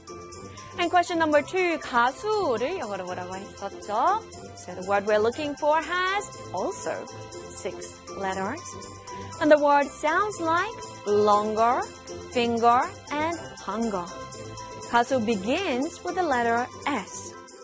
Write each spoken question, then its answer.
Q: 가수를 영어로 뭐라고 했었죠?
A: 가수 in English is S-I-N-G-E-R, singer.